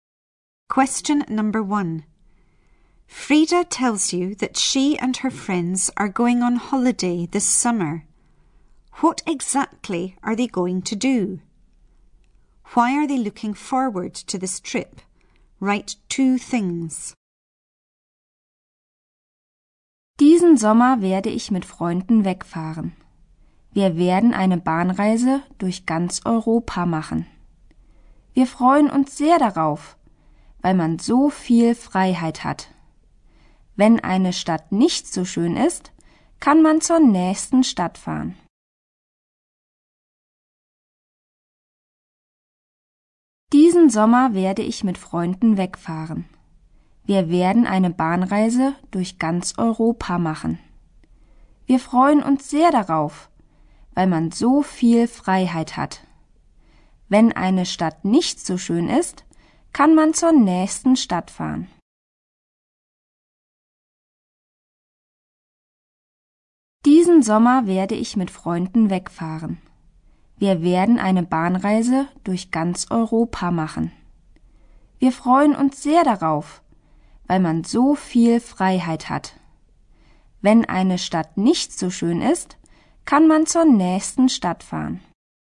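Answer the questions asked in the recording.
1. Go on a train journey through all of Europe
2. You have so much freedom; if a town isn't nice you can go on to the next one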